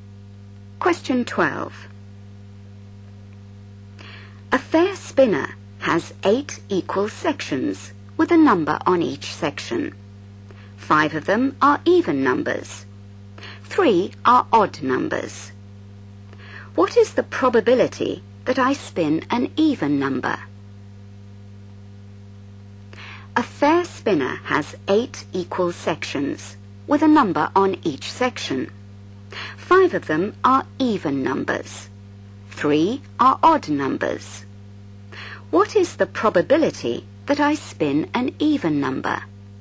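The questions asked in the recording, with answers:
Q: What is the probability that I spin an even number?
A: 5/8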